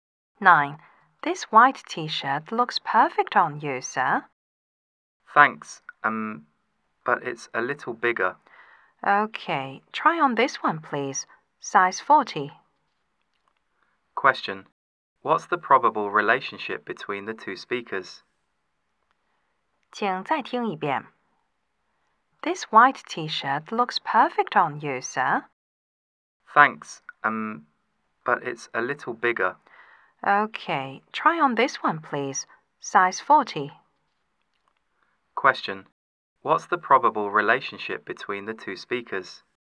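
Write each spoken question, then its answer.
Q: What's the probable relationship between the two speakers?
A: Shop assistant and customer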